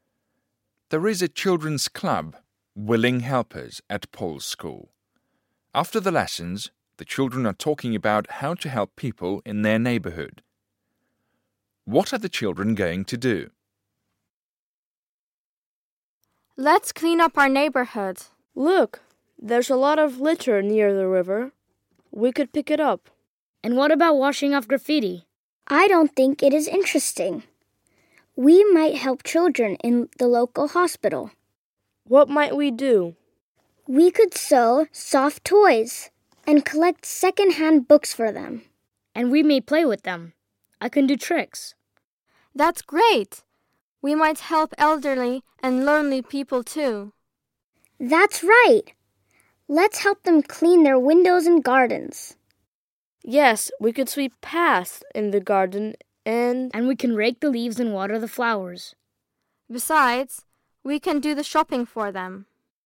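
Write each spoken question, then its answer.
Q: What are the children going to do?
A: Clean up the neighbourhood (pick up litter), help children in the local hospital, and help elderly and lonely people.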